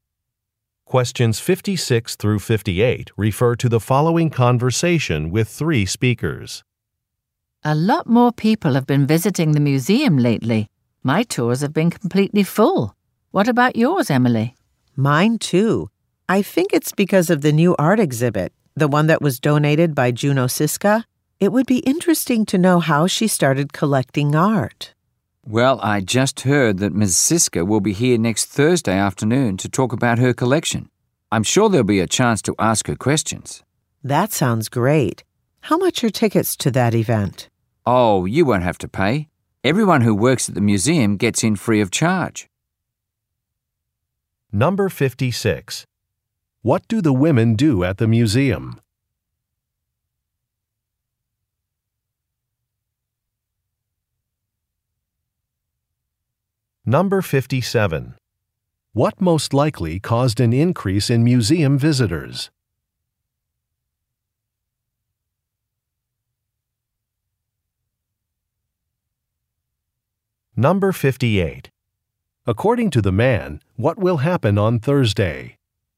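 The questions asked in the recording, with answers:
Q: What do the women do at the museum?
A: Lead tours

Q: What most likely caused an increase in museum visitors?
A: A new art exhibit

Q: According to the man, what will happen on Thursday?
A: The art collector will talk about her collection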